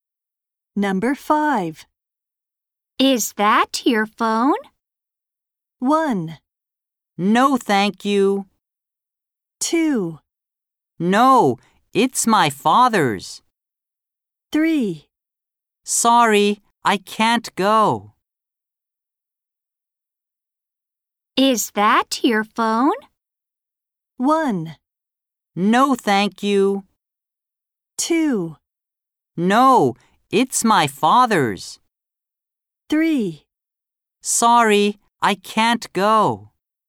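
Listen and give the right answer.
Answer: 2: No, it's my father's.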